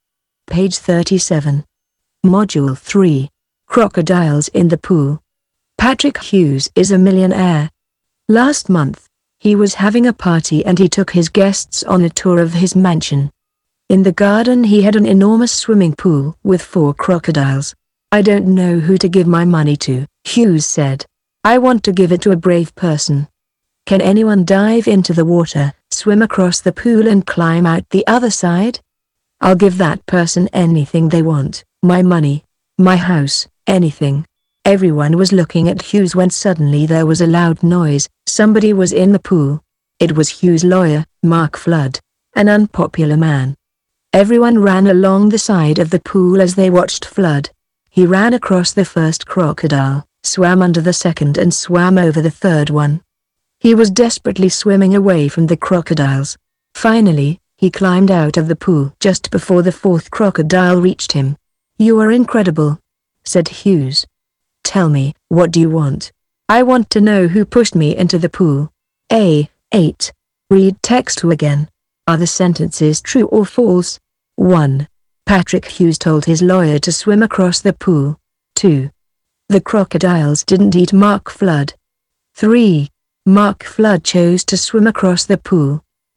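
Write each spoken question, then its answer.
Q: Patrick Hughes told his lawyer to swim across the pool.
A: False

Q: The crocodiles didn't eat Mark Flood.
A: True

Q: Mark Flood chose to swim across the pool.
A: False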